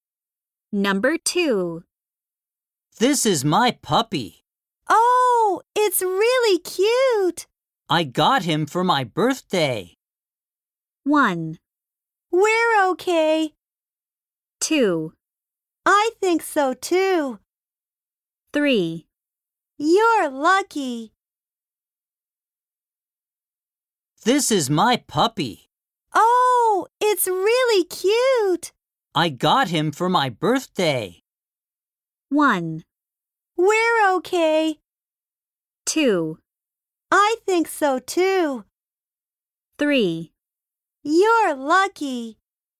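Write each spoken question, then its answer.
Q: I got him for my birthday.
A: 3: You're lucky.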